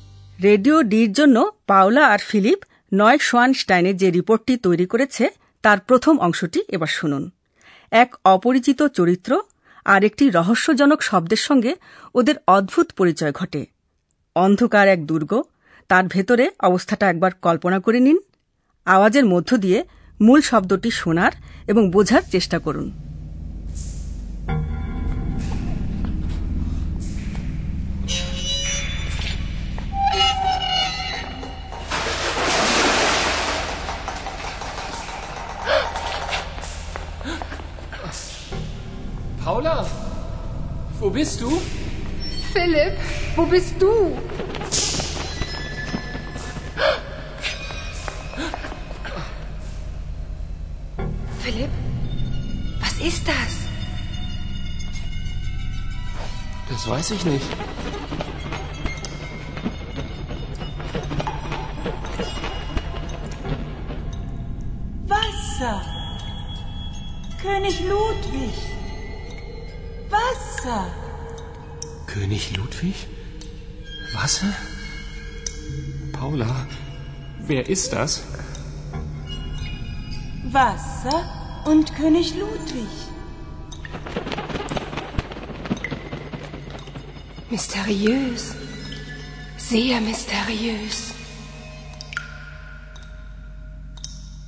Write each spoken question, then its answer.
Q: আওয়াজের মধ্য দিয়ে মূল শব্দটি শোনার এবং বোঝার চেষ্টা করুন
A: মূল শব্দটি হল জল